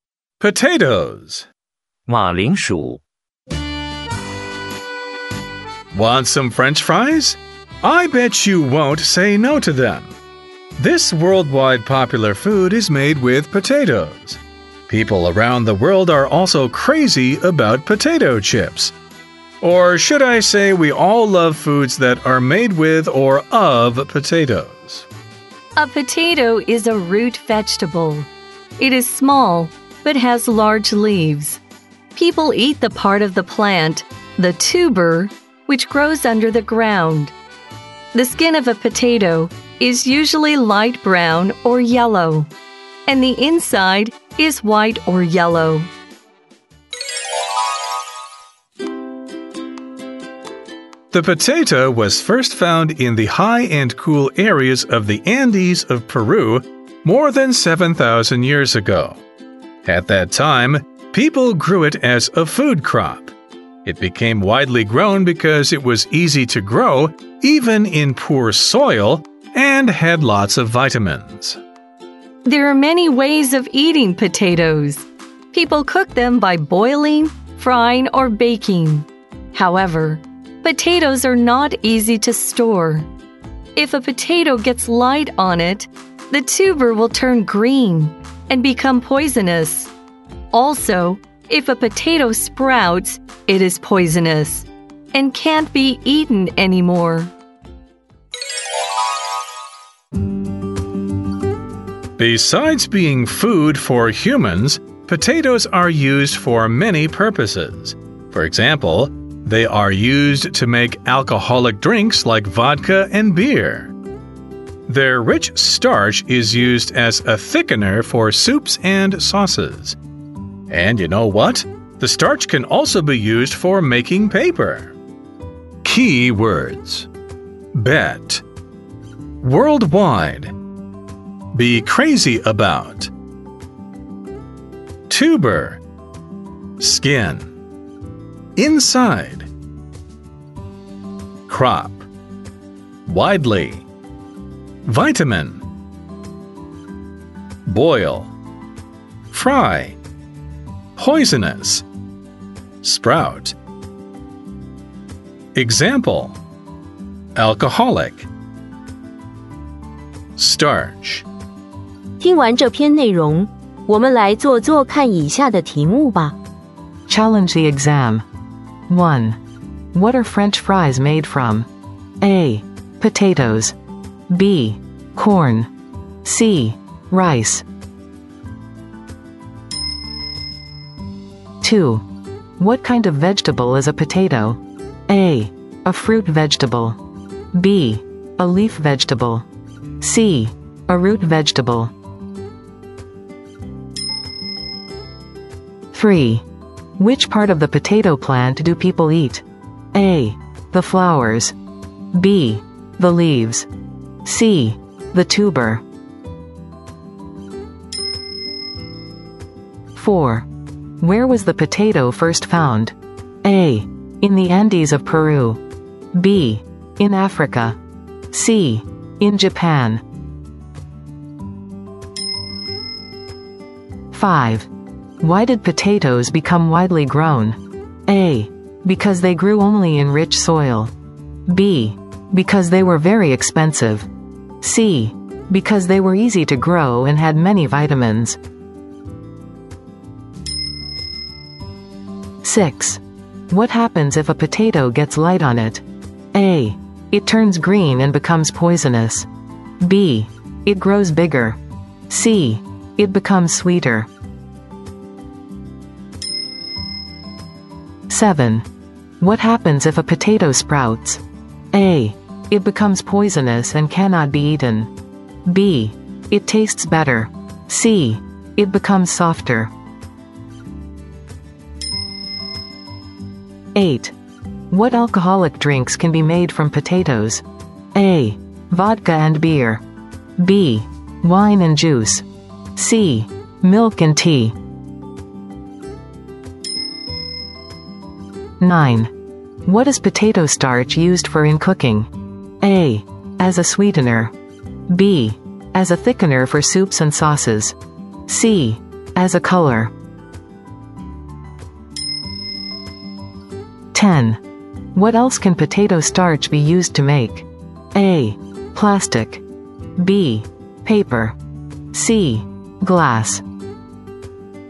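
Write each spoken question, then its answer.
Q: What are French fries made from?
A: A: Potatoes.

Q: What kind of vegetable is a potato?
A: C: A root vegetable.

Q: Which part of the potato plant do people eat?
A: C: The tuber.

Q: Where was the potato first found?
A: A: In the Andes of Peru.

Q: Why did potatoes become widely grown?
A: C: Because they were easy to grow and had many vitamins.

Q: What happens if a potato gets light on it?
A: A: It turns green and becomes poisonous.

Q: What happens if a potato sprouts?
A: A: It becomes poisonous and cannot be eaten.

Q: What alcoholic drinks can be made from potatoes?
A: A: Vodka and beer.

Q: What is potato starch used for in cooking?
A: B: As a thickener for soups and sauces.

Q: What else can potato starch be used to make?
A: B: Paper.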